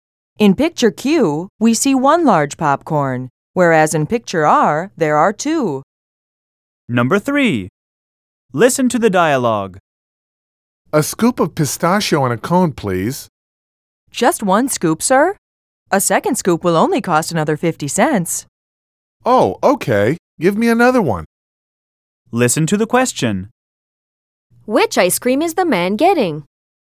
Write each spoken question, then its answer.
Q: Which ice cream is the man getting?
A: In picture Q, we see two scoops of pistachio in a cone